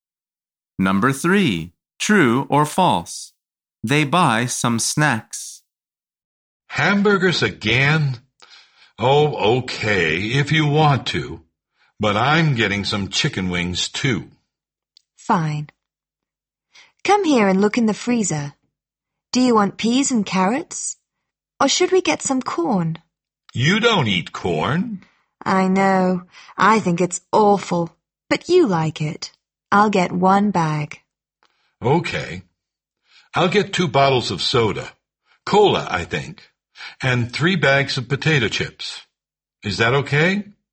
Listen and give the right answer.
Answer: The answer is true.